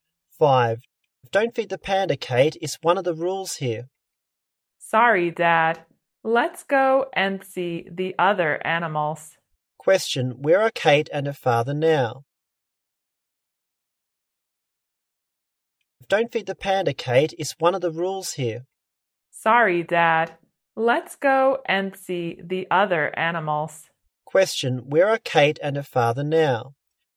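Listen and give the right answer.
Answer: At the zoo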